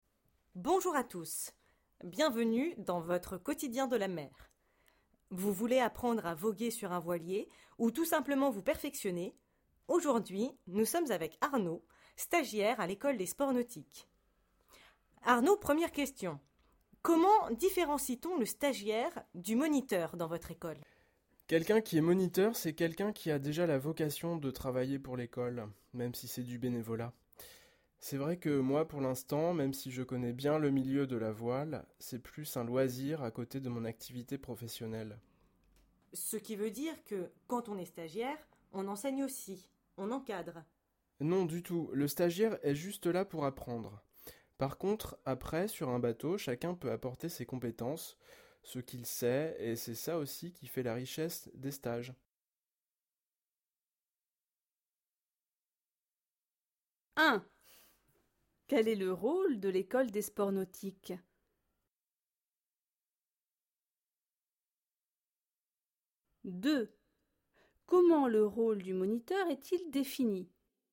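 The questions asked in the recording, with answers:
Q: Comment le rôle du moniteur est-il défini?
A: Il a la vocation de travailler pour l'école, même bénévolement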